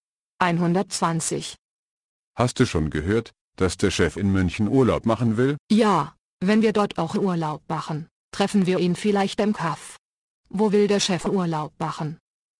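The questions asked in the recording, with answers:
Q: Wo will der Chef Urlaub machen?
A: In München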